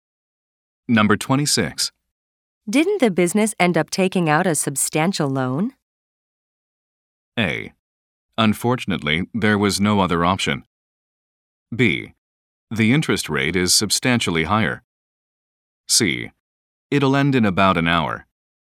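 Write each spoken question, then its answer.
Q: Didn't the business end up taking out a substantial loan?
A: A: Unfortunately, there was no other option.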